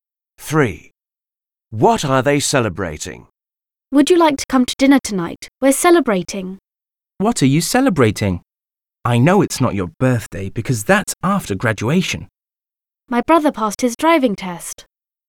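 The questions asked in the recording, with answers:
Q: What are they celebrating?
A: Her brother passed his driving test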